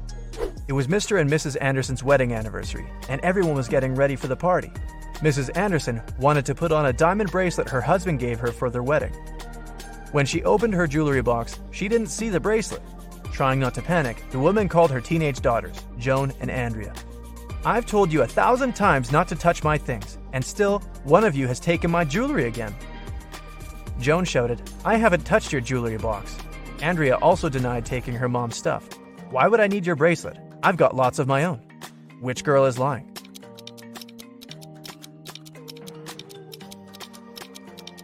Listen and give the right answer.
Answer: It was Andrea who took the earrings.